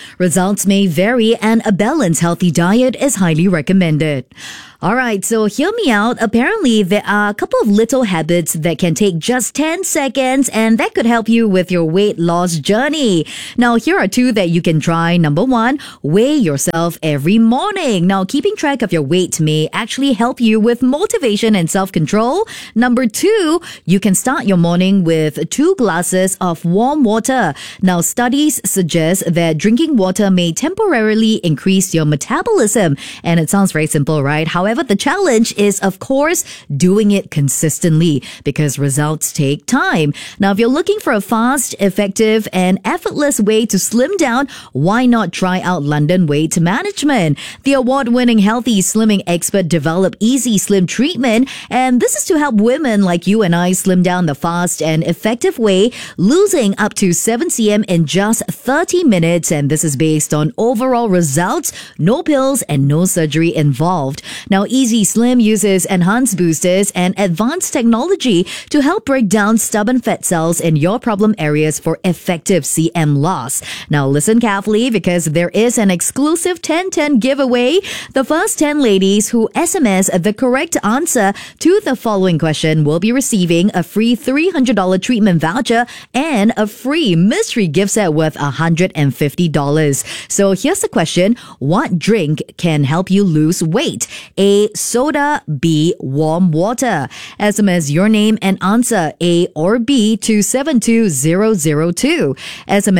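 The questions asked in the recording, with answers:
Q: What drink can help you lose weight?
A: B: Warm water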